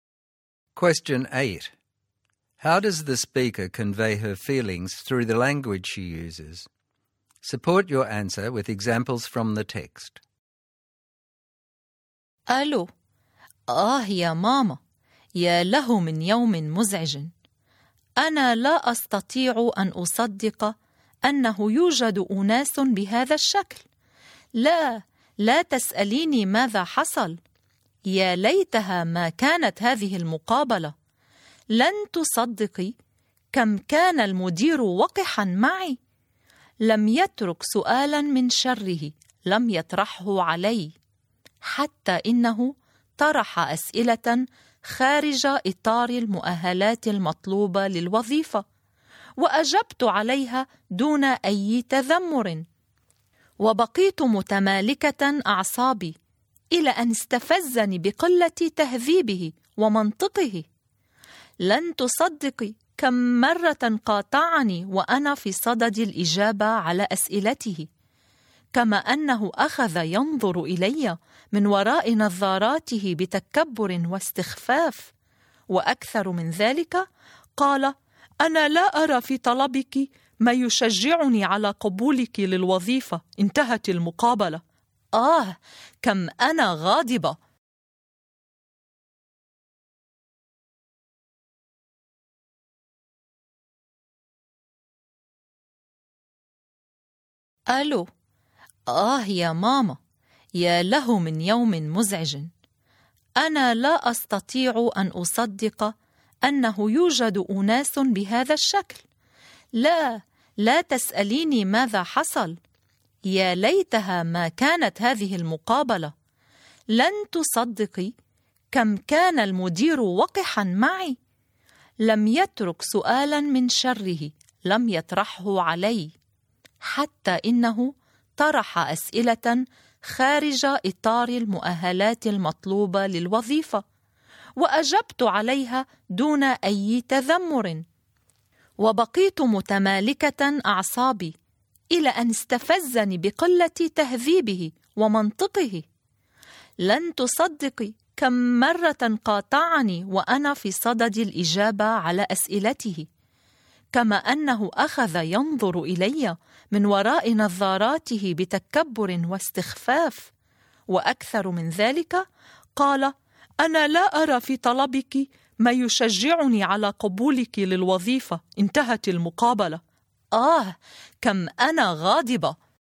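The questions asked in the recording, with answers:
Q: How does the speaker convey her feelings through the language she uses?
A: She uses exclamations and emotive phrases to show her anger and frustration, e.g. "يا له من يوم مزعج", "يا ليتها ما كانت هذه المقابلة", "لن تصدقي كم كان المدير وقحا معي", "آه، كم أنا غاضبة"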